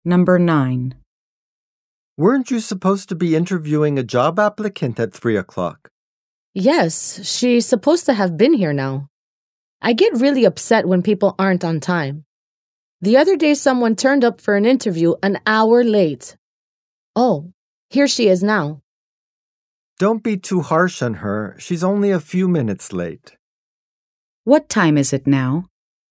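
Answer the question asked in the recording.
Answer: A few minutes after 3 o'clock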